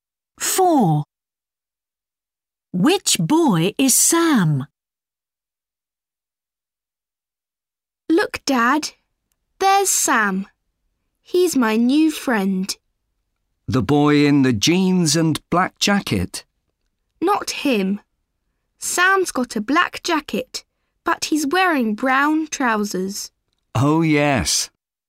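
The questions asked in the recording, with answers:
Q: Which boy is Sam?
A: The boy in a black jacket and brown trousers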